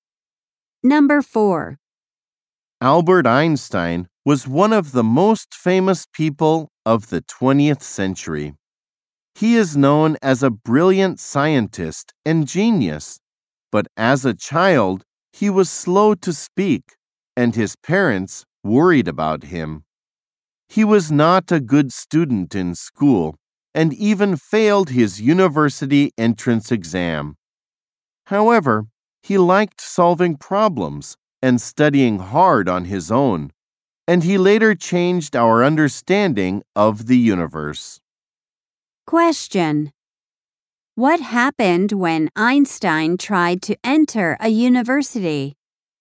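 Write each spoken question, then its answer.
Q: What happened when Einstein tried to enter a university?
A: He failed the entrance exam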